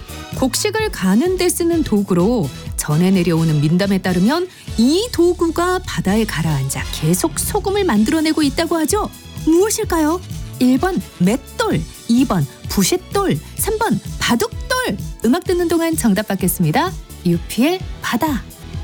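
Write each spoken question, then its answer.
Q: 무엇일까요? 1번 맷돌, 2번 부싯돌, 3번 바둑돌.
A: 1: 맷돌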